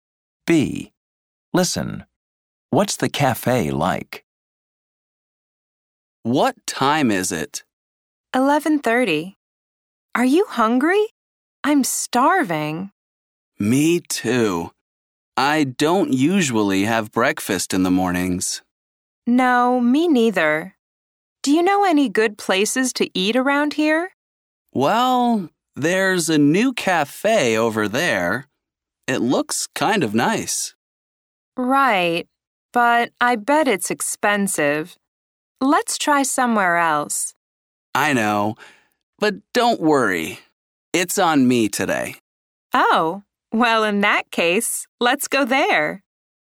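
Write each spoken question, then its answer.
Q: What's the cafe like?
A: It's new and looks kind of nice, but it's probably expensive.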